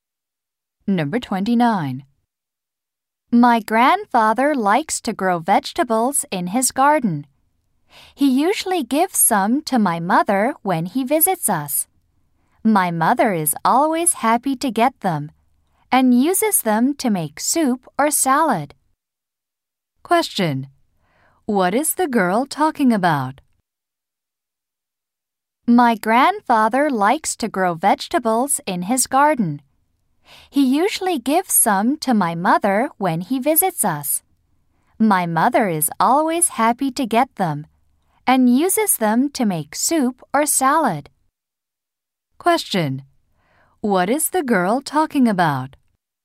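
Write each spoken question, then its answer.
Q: Question. What is the girl talking about?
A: Her grandfather's vegetables.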